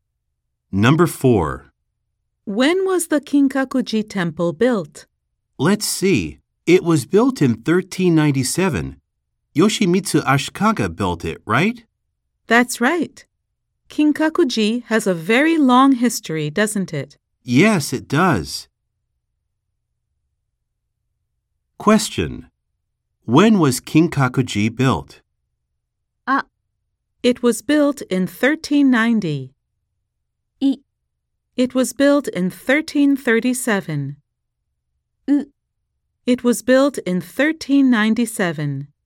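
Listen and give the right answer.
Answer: U: It was built in 1397.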